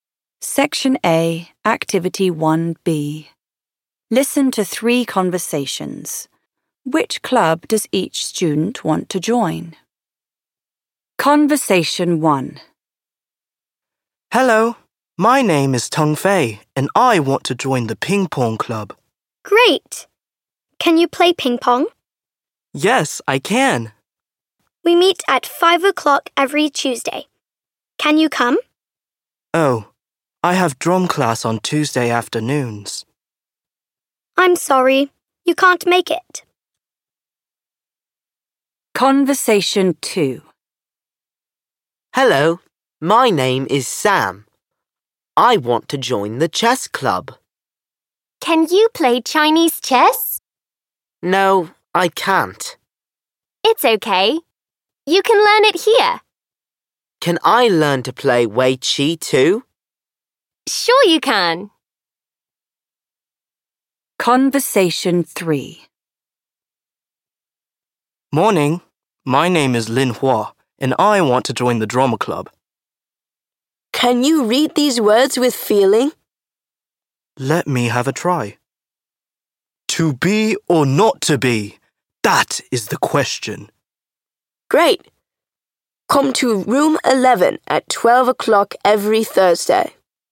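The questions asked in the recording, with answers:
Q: Which club does each student want to join?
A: Tung Fei: ping pong club; Sam: chess club; Lin Hua: drama club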